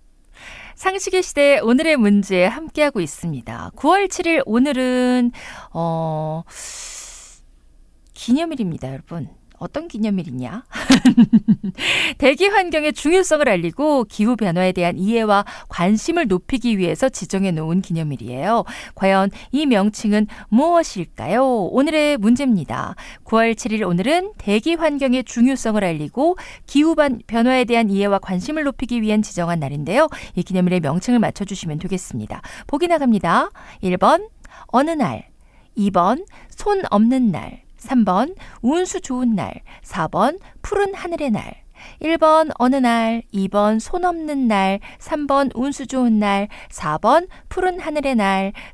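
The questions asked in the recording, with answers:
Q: 이 기념일의 명칭을 맞춰주시면 되겠습니다.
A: 4번: 푸른 하늘의 날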